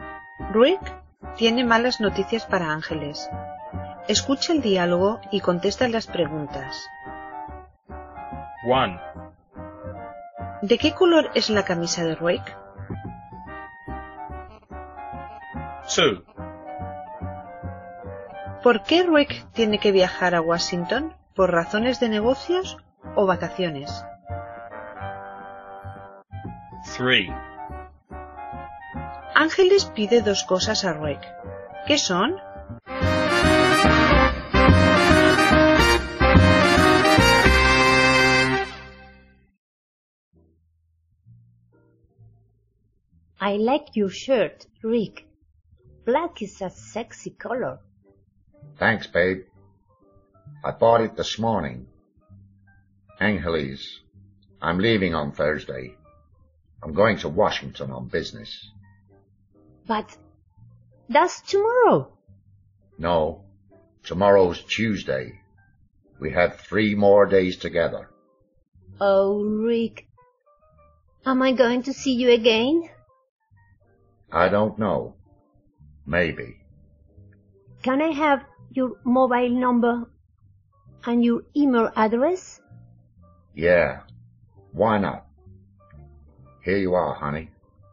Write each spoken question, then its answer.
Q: ¿De qué color es la camisa de Rick?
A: It's black.

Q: ¿Por qué Rick tiene que viajar a Washington?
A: Por razones de negocios.

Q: Ángeles pide dos cosas a Rick.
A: Su número de móvil y su dirección de correo electrónico.